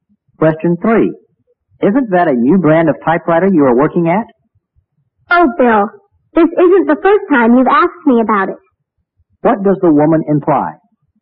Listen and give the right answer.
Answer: The man is a forgetful person